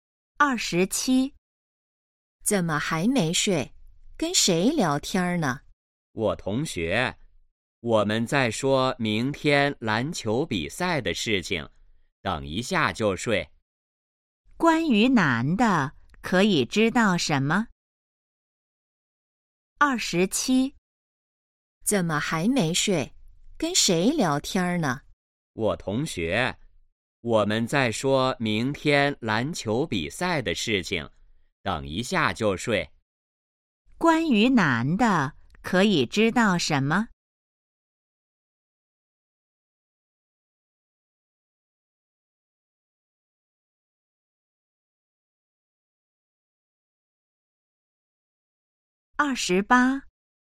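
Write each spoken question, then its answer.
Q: 关于男的,可以知道什么?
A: 在和同学聊明天篮球比赛的事,还没睡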